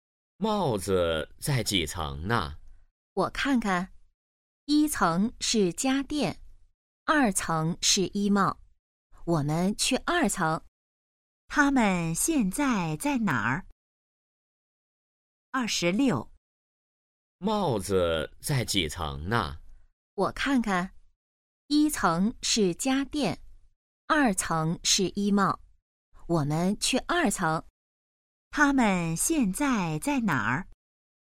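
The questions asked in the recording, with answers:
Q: 他们现在在哪儿?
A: 商场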